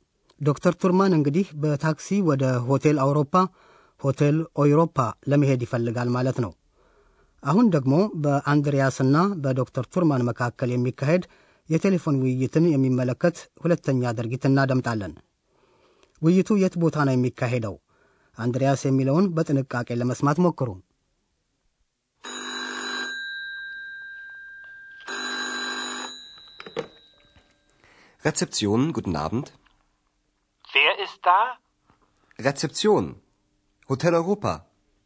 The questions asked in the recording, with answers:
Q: ውይይቱ የት ቦታ ነው የሚካሄደው?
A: አንድሪያስ የሚገኘው በእንግዳ መቀበያው ሬትሴፕሲዮን ሲሆን ትምህርታችን የሚካሄደው በሆቴል አውሮፓ ውስጥ መሆኑ ነው።